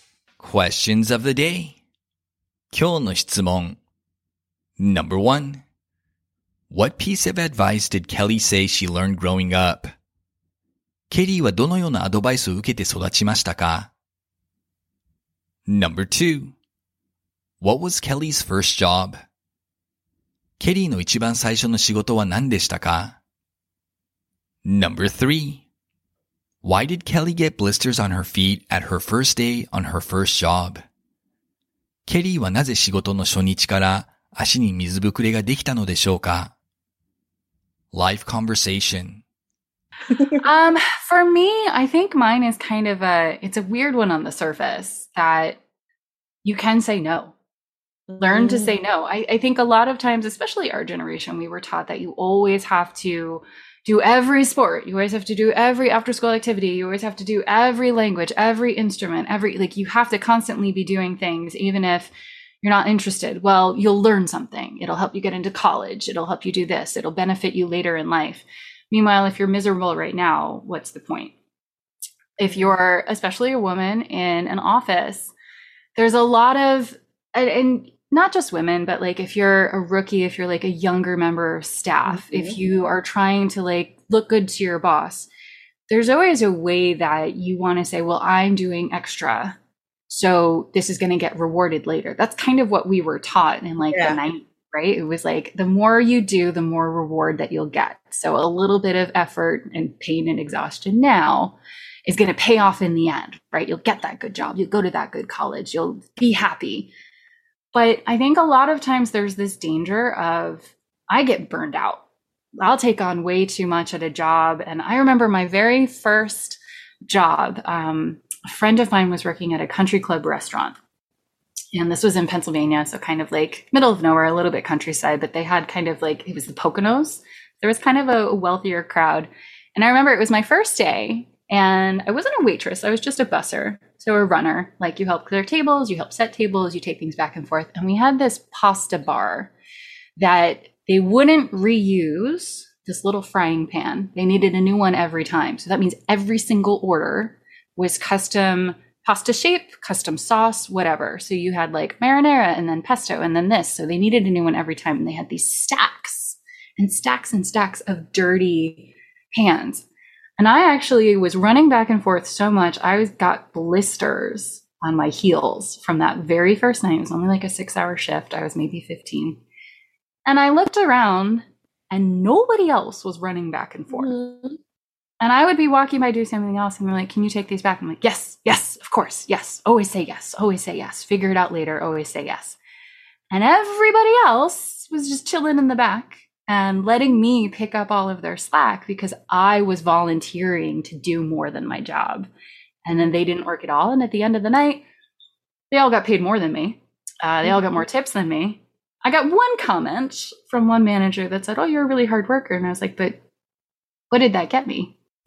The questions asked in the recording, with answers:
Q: What was Kelly's first job?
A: She was a busser at a restaurant in Pennsylvania.

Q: Why did Kelly get blisters on her feet at her first day on her first job?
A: She got blisters because she was doing so much running back and forth.